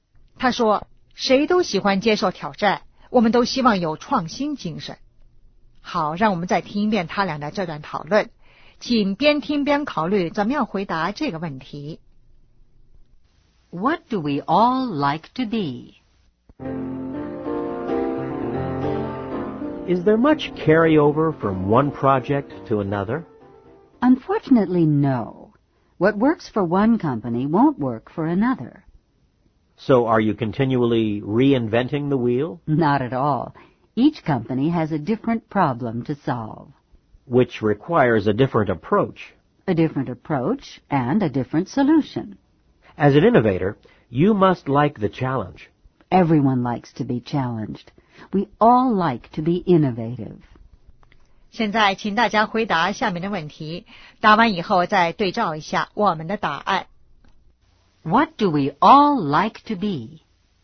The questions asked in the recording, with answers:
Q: What do we all like to be?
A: Challenged and innovative.